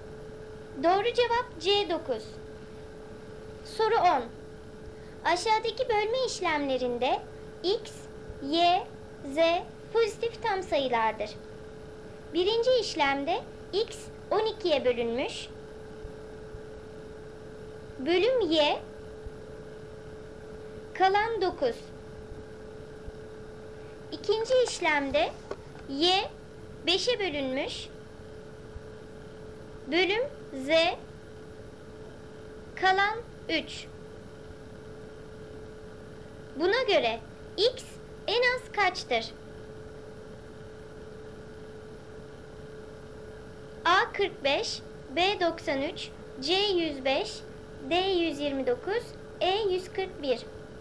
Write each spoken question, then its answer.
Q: Buna göre x en az kaçtır?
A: Doğru cevap C 105.